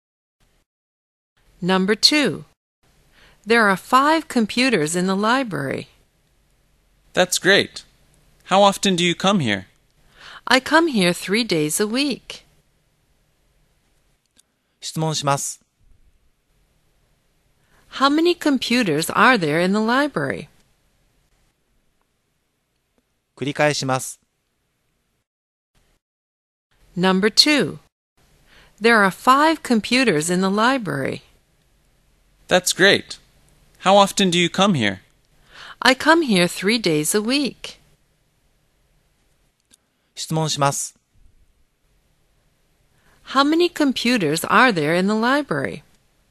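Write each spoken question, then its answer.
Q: How many computers are there in the library?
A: Five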